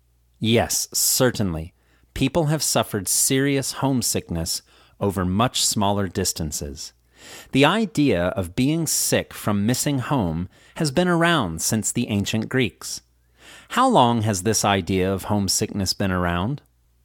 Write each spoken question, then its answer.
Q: How long has this idea of homesickness been around?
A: This idea has been around since the ancient Greeks.